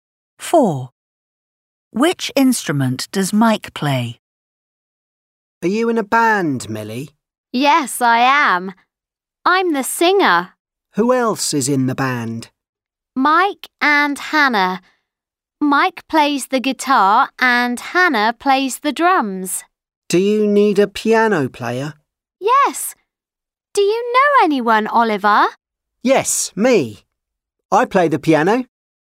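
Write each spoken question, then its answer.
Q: Which instrument does Mike play?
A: the guitar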